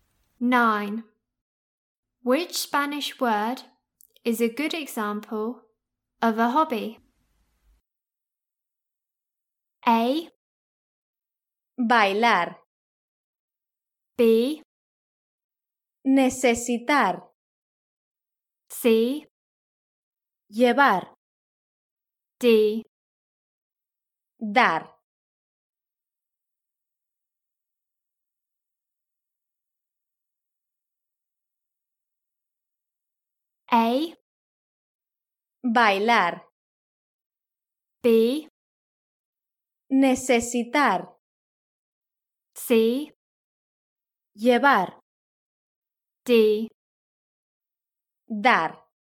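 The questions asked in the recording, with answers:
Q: Which Spanish word is a good example of a hobby?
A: A: Bailar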